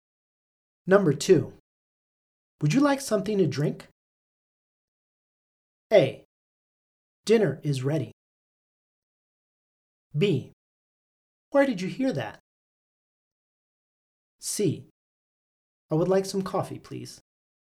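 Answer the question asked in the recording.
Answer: C: I would like some coffee, please.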